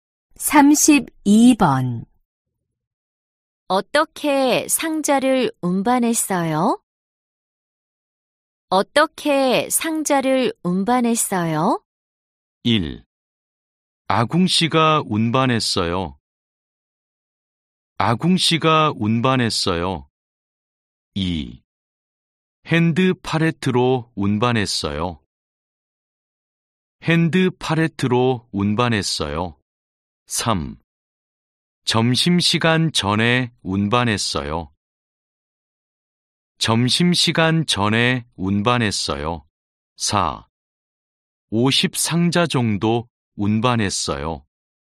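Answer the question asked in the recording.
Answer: 2: 핸드 팔레트로 운반했어요.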